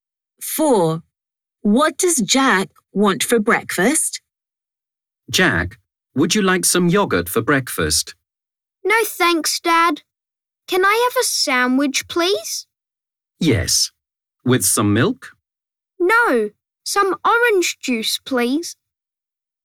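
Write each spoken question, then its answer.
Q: What does Jack want for breakfast?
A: a sandwich (with orange juice)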